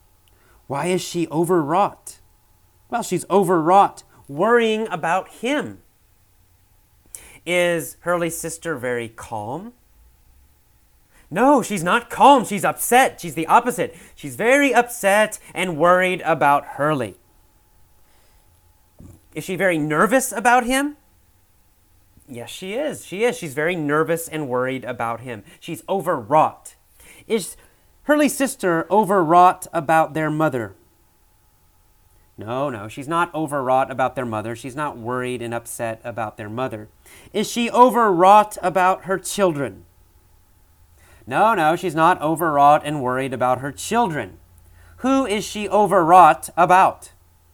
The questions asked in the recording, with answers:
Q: Who is she overwrought about?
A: Well, she's overwrought, she's worried and nervous about Hurley.